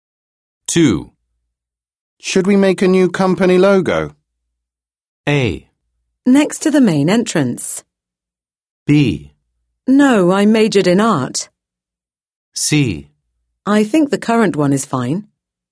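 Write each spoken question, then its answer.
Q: Should we make a new company logo?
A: C: I think the current one is fine.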